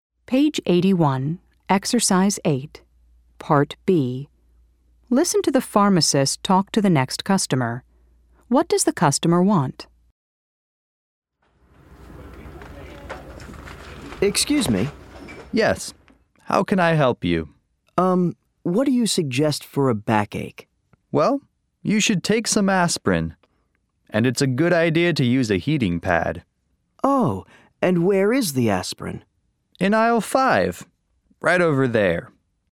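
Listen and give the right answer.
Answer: Something for a backache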